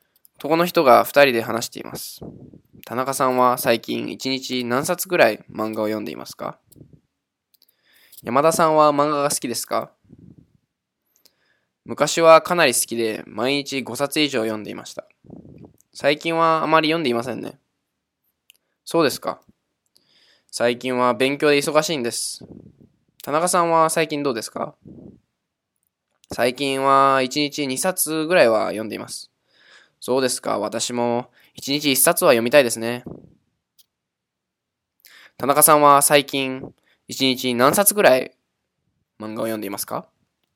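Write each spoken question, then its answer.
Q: 田中さんは最近一日何冊ぐらい漫画を読んでいますか?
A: 2冊ぐらい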